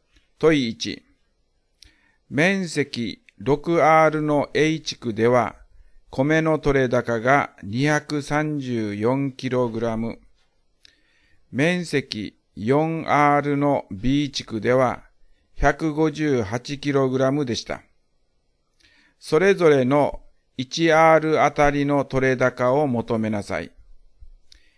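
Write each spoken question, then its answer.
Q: 面積 6R の A 地区では、米の取れ高が 234kg。面積 4R の B 地区では、158kg でした。それぞれの 1R あたりの取れ高を求めなさい。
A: A地区 39kg、B地区 39.5kg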